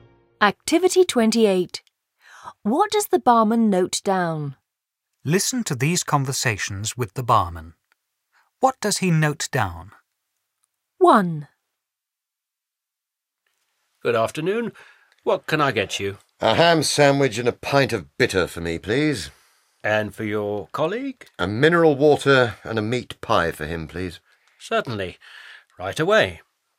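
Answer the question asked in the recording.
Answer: A ham sandwich, a pint of bitter, a mineral water and a meat pie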